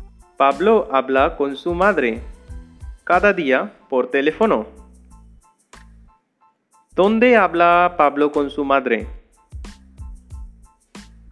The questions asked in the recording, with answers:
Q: ¿Dónde habla Pablo con su madre?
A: Pablo habla con su madre por teléfono.